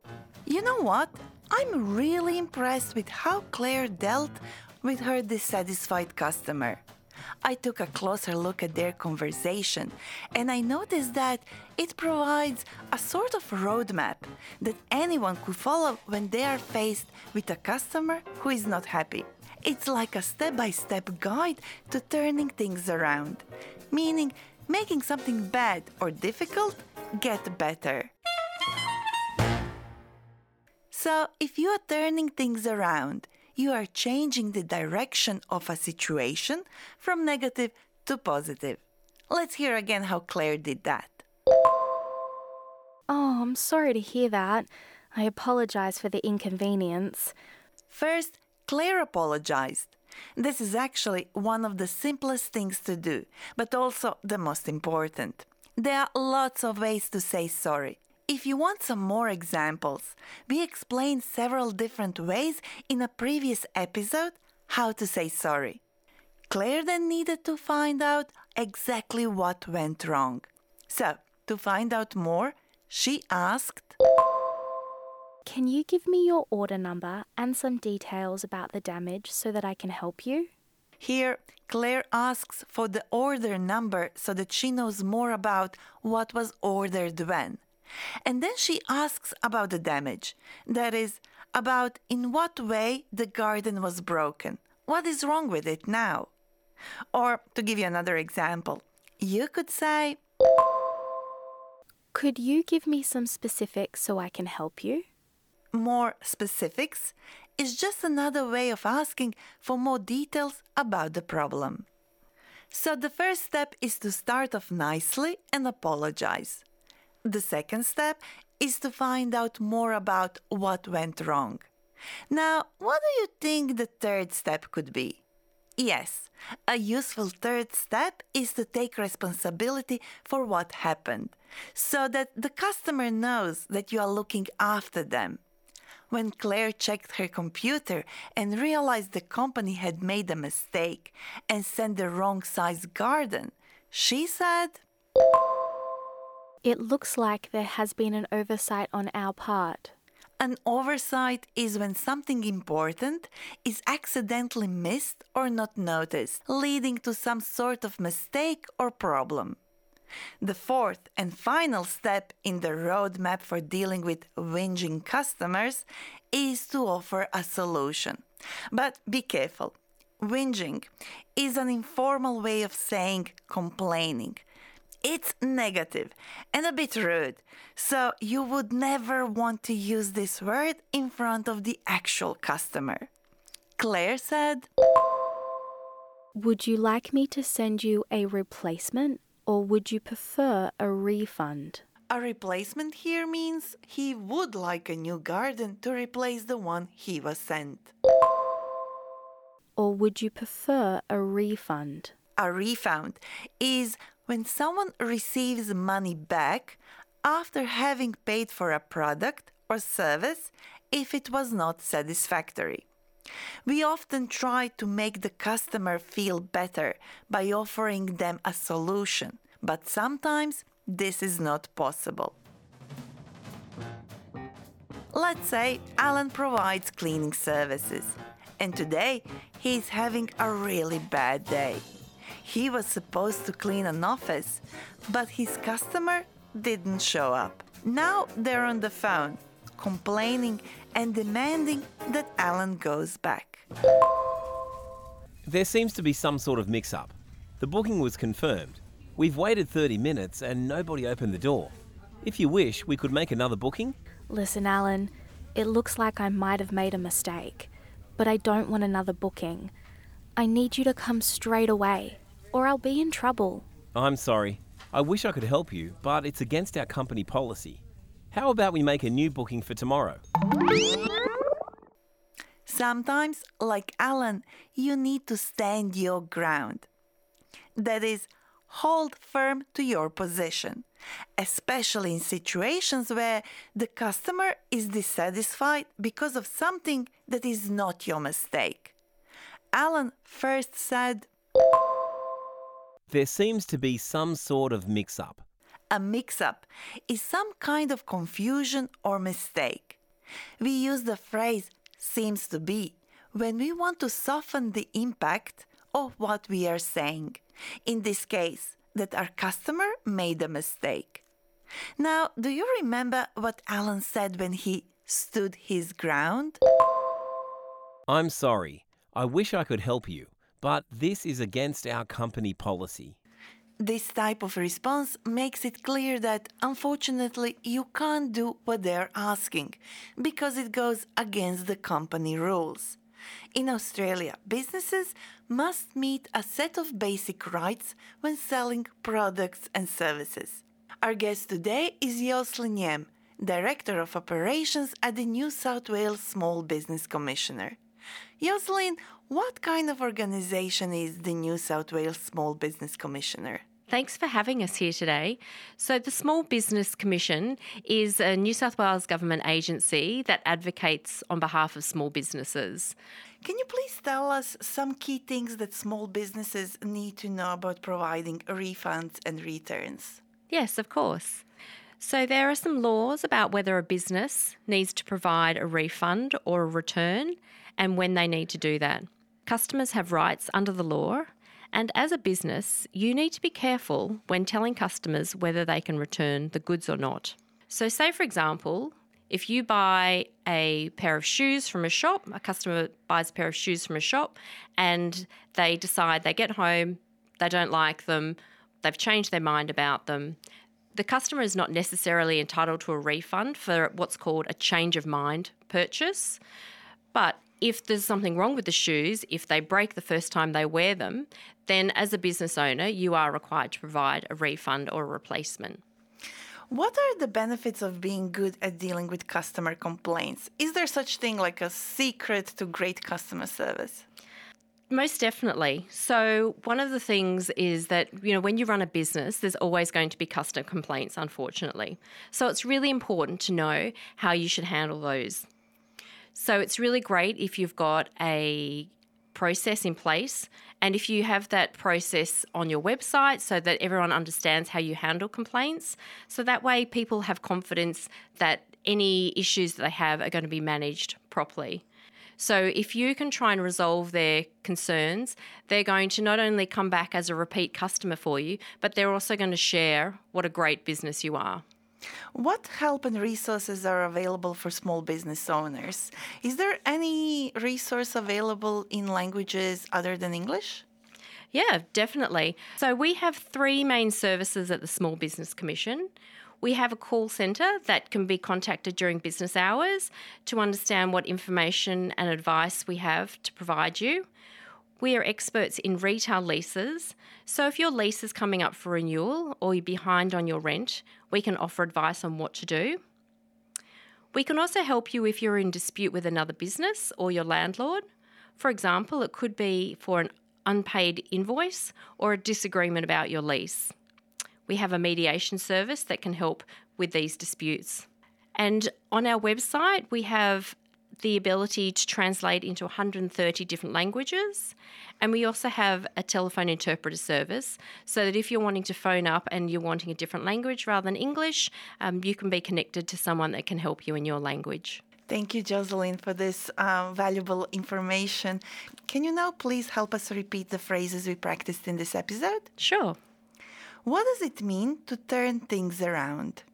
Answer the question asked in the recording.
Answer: To turn things around means to change the direction of a situation from negative to positive.